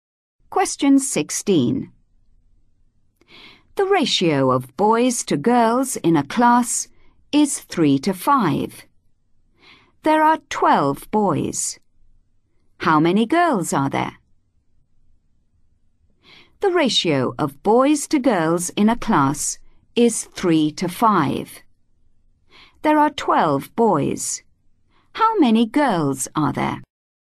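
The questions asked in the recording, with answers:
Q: There are 12 boys. How many girls are there?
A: 20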